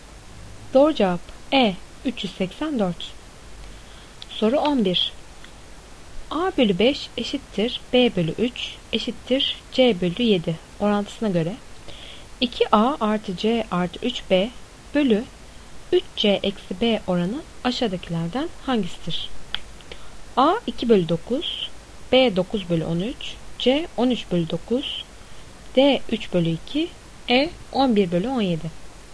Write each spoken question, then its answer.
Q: A bölü 5 eşittir B bölü 3 eşittir C bölü 7 orantısına göre 2A artı C artı 3B bölü 3C eksi B oranı aşağıdakilerden hangisidir?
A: Doğru cevap C 13 bölü 9.